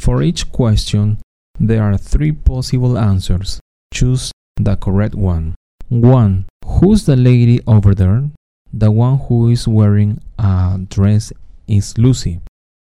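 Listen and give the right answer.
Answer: Lucy (the one wearing a dress)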